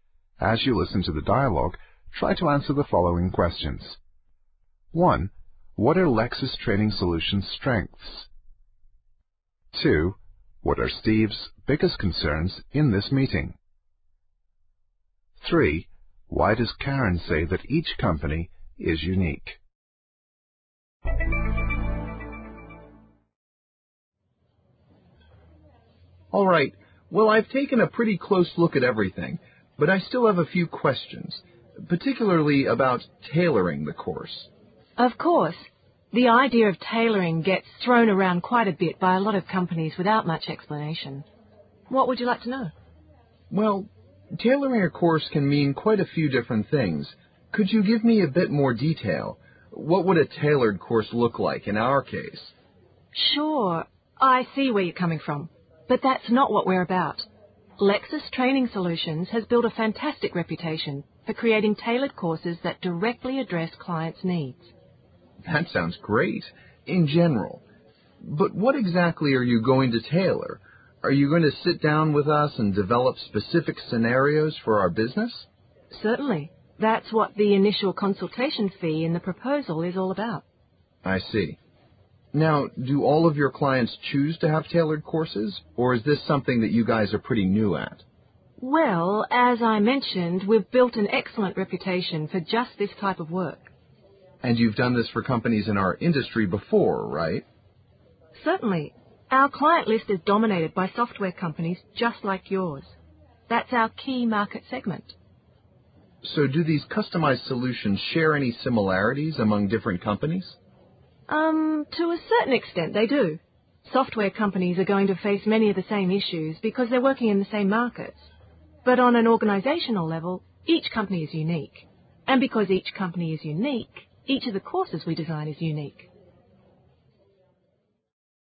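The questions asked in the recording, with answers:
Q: What are Lexis Training Solutions' strengths?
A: They have an excellent reputation for tailored courses that meet clients' needs, and a lot of experience with software companies.

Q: What are Steve's biggest concerns in this meeting?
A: What tailoring really means for his company, and whether Lexis has enough experience in his industry.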